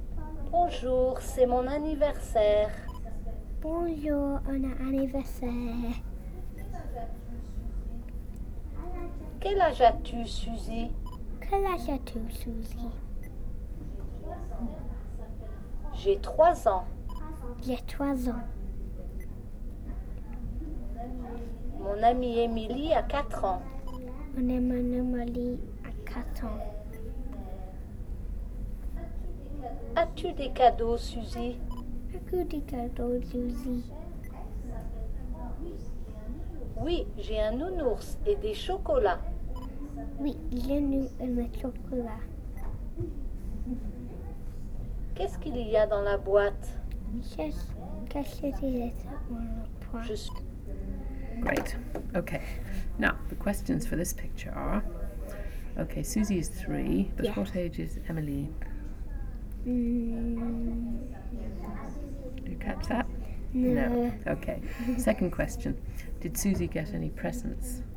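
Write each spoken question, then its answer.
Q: Did Susie get any presents?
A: Yes, a teddy and chocolates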